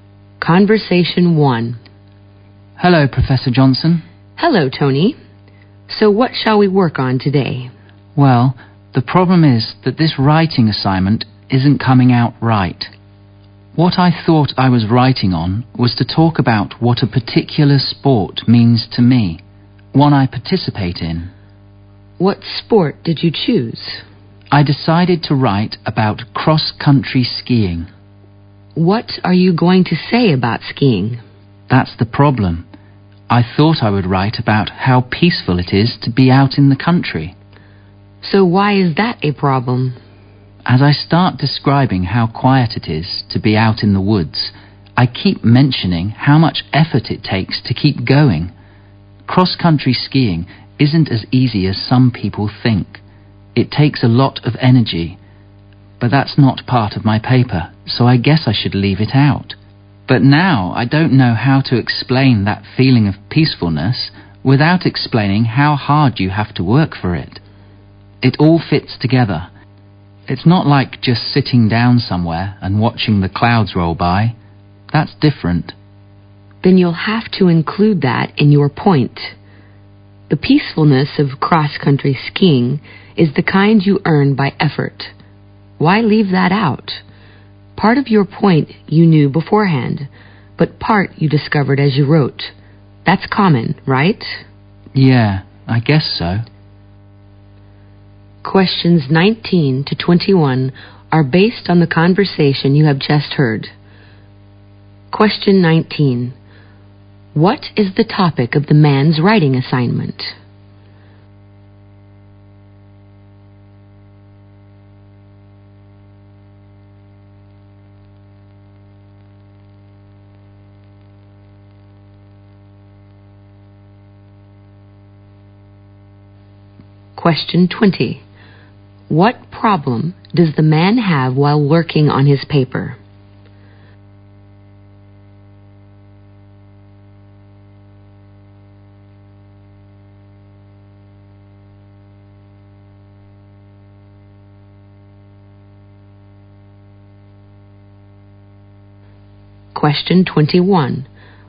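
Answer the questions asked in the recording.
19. What a sport he takes part in (cross-country skiing) means to him.
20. He can't explain the peacefulness without describing the hard effort it takes.
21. Finding new points while you write.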